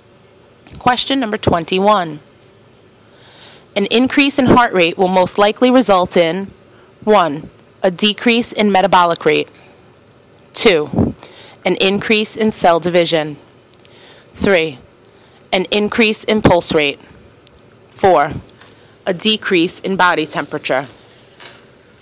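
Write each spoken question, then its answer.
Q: An increase in heart rate will most likely result in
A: 3: An increase in pulse rate.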